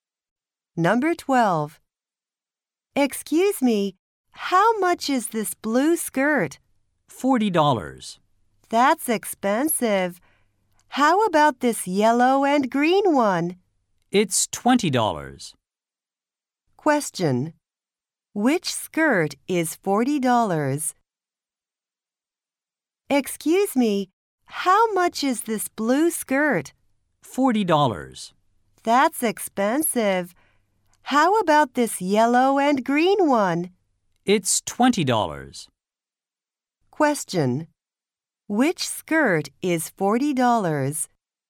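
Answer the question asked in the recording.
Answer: The blue one.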